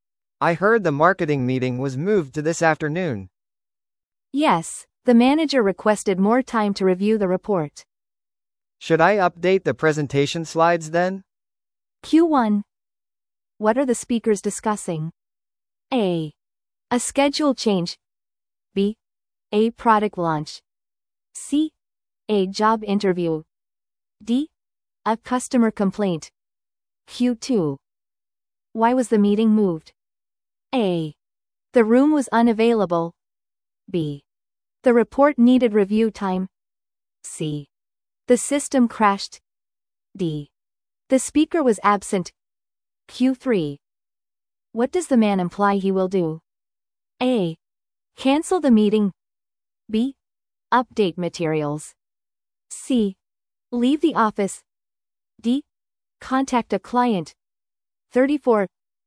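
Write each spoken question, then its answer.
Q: What are the speakers discussing?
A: A: A schedule change.

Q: Why was the meeting moved?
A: B: The report needed review time.

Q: What does the man imply he will do?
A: B: Update materials.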